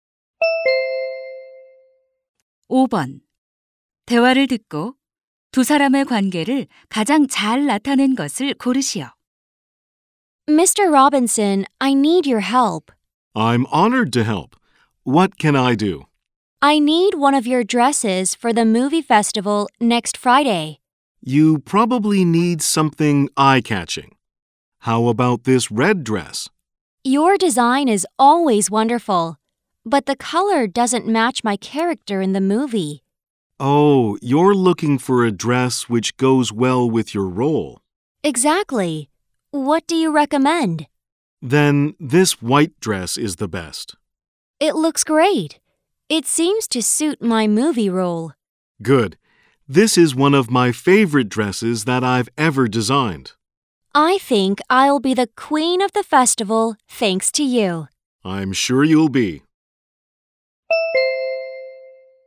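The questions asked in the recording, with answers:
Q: 대화를 듣고 두 사람의 관계를 가장 잘 나타낸 것을 고르시오.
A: 영화배우 - 의상 디자이너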